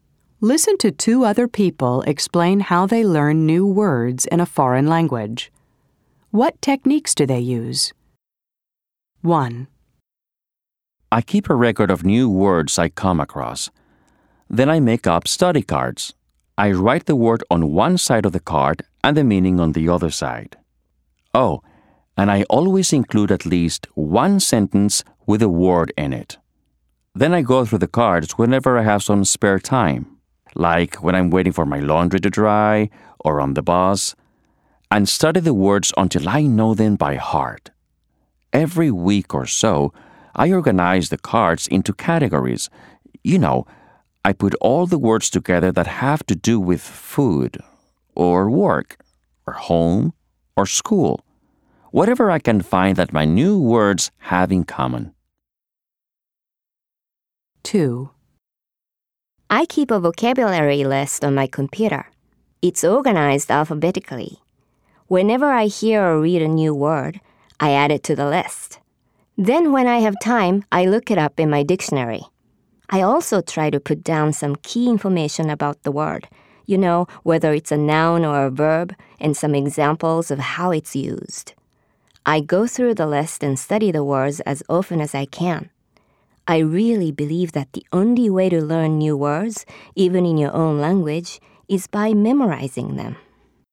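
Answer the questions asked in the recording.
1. Makes study cards with the word, its meaning and a sentence, studies them in spare time, and sorts them into categories
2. Keeps an alphabetical vocabulary list on the computer, looks words up in the dictionary, notes the part of speech and examples, and memorizes them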